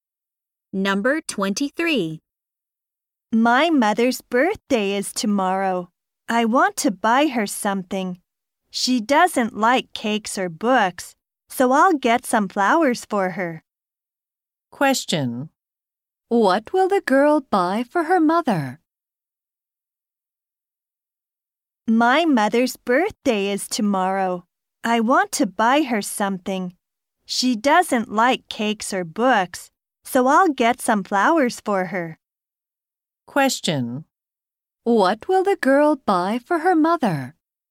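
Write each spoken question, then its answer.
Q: What will the girl buy for her mother?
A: Some flowers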